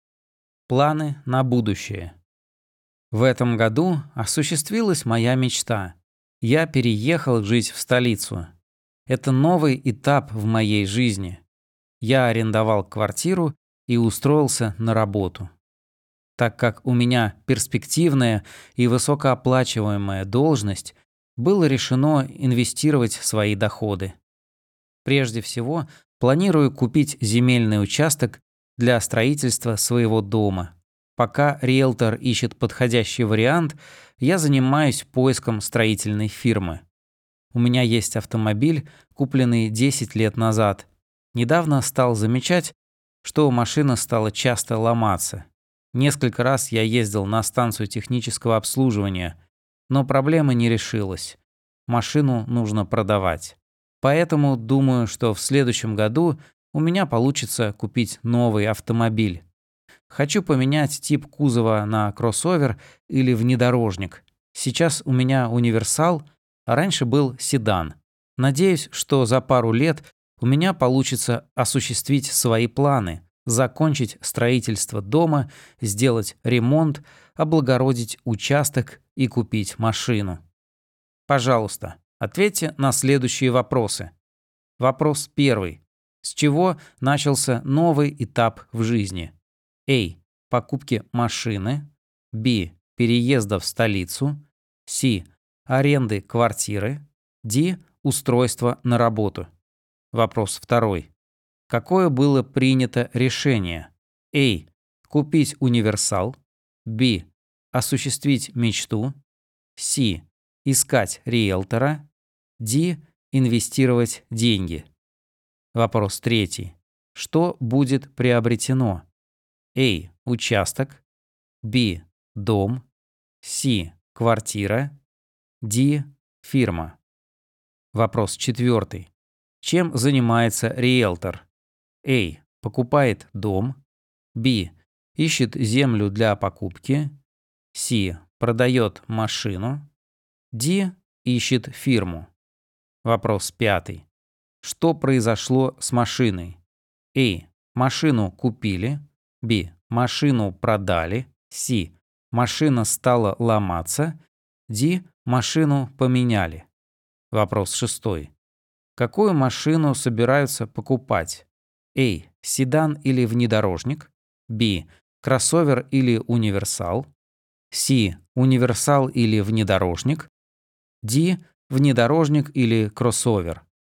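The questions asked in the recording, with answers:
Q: С чего начался новый этап в жизни?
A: Б: Переезда в столицу.

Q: Какое было принято решение?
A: Д: Инвестировать деньги.

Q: Что будет приобретено?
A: А: Участок.

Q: Чем занимается риэлтор?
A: Б: Ищет землю для покупки.

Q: Что произошло с машиной?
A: С: Машина стала ломаться.

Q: Какую машину собираются покупать?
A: Д: Внедорожник или кроссовер.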